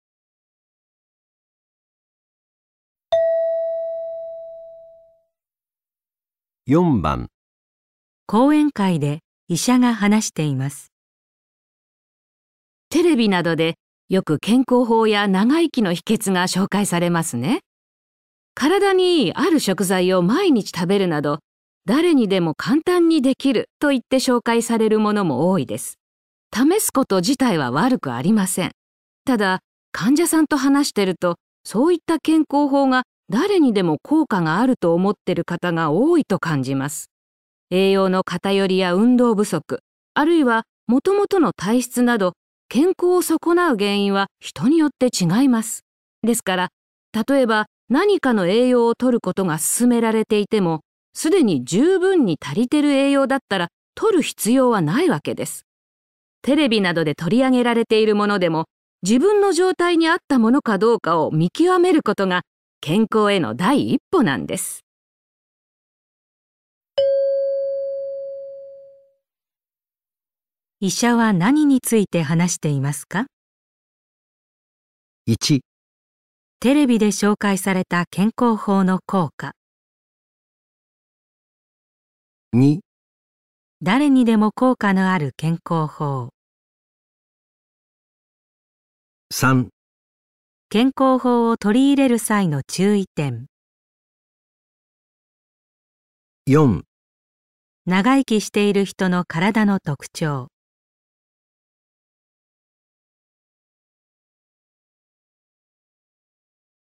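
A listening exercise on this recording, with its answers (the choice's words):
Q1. 医者は何について話していますか。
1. テレビで紹介された健康法の効果。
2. 誰にでも効果がある健康法。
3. 健康法を取り入れる際の注意点。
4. 長生きしている人の体の特徴。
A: 健康法を取り入れる際の注意点。

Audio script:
ただ、患者さんと話してる とそういった健康法が誰にでも効果があると思ってる方が多いと感じます。 栄養の偏りや運動不足、あるいは 元々の体質など、 健康を損なう原因は人によって違います。 ですから、 例えば何かの栄養をとることが勧めら れていても、すでに十分に足りてる栄養だったら取る必要はないわけです。 テレビなどで取り上げられているも のでも、自分の状態に合ったものかどうかを見極めることが健康への第一歩なんです。
問題:医者は何について話していますか。

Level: 【N1 第1回】聴解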